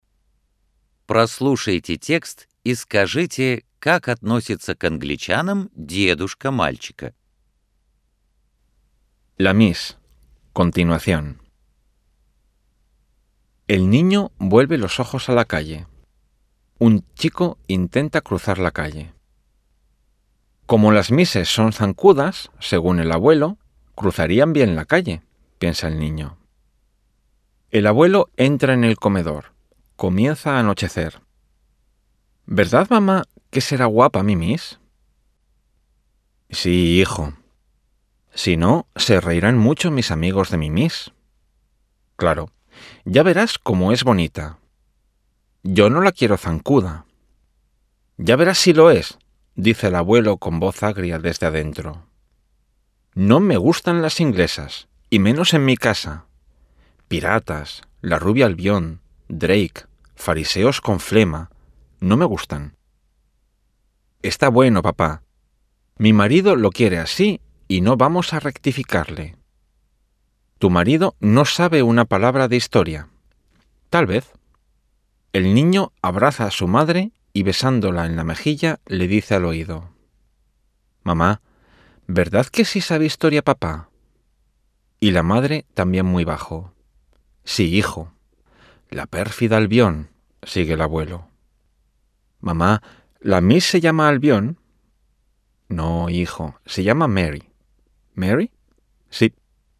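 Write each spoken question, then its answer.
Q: как относится к англичанам дедушка мальчика.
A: Отрицательно: он не любит англичан (называет их пиратами и фарисеями)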